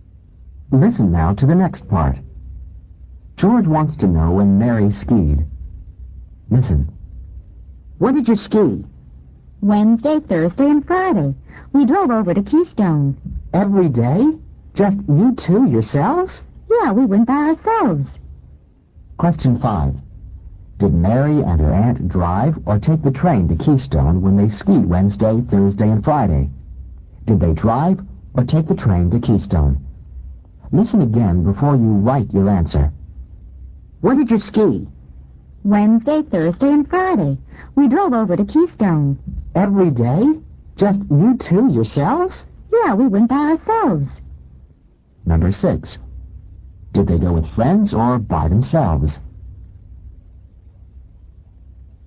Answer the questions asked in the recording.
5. Number 5. They drove, D-R-O-V-E, to Keystone.
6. Number 6. They went by themselves.